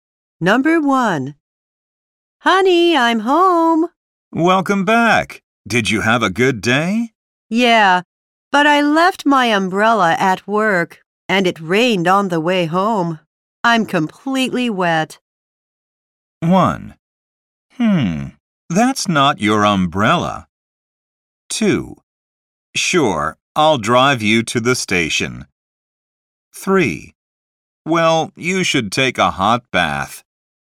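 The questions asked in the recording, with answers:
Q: I'm completely wet.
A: 3: Well, you should take a hot bath.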